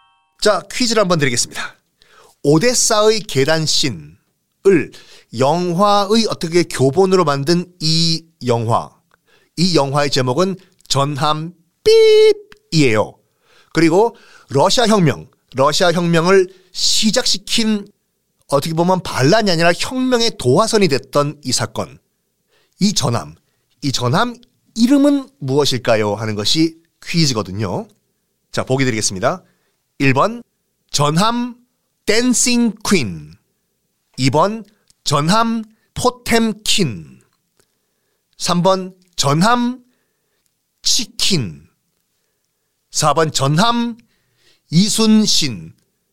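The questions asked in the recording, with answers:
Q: 이 전함 이름은 무엇일까요?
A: 2: 전함 포템킨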